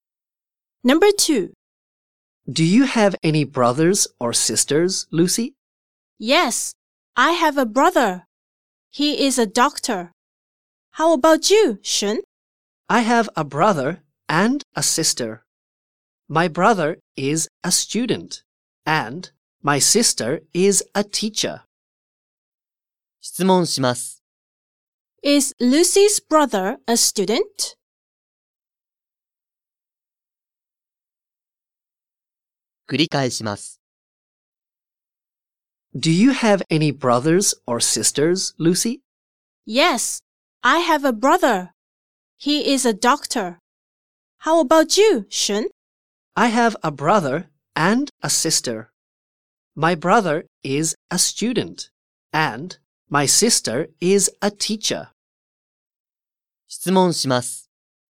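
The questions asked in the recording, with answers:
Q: Is Lucy's brother a student?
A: No, he is a doctor.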